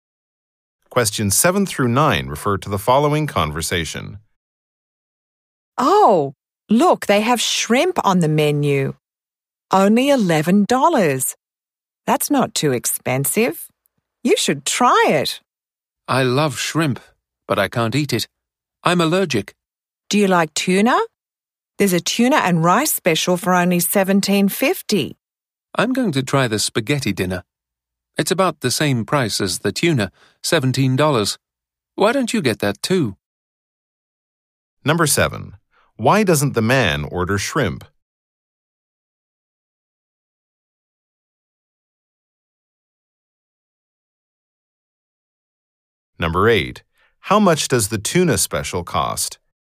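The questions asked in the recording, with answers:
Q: Why doesn't the man order shrimp?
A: He is allergic to it

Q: How much does the tuna special cost?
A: $17.50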